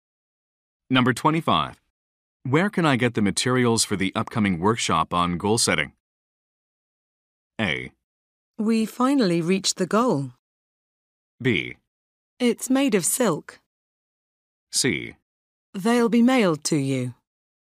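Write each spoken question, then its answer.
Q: Where can I get the materials for the upcoming workshop on goal setting?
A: C: They'll be mailed to you.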